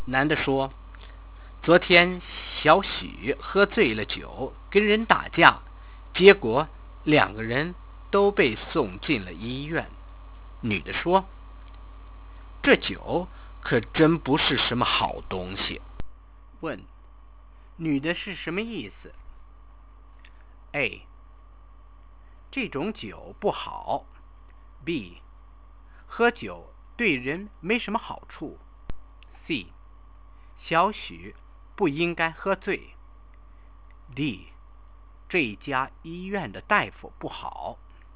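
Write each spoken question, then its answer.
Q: 问,女的是什么意思?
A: B: 喝酒对人没什么好处。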